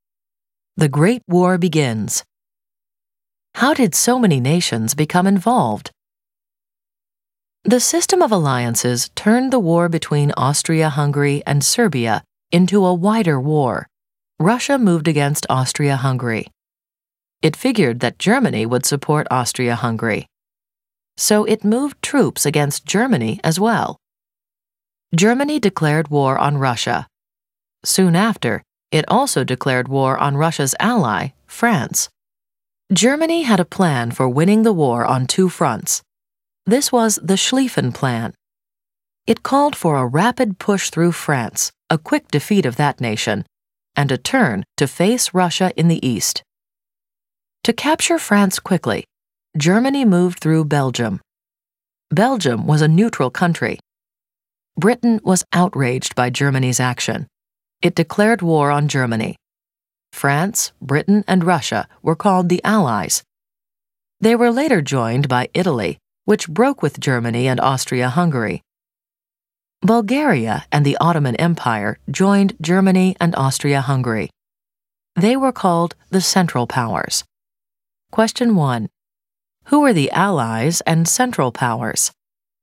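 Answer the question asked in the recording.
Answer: Allies: France, Britain, Russia, later Italy; Central Powers: Germany, Austria-Hungary, Bulgaria, Ottoman Empire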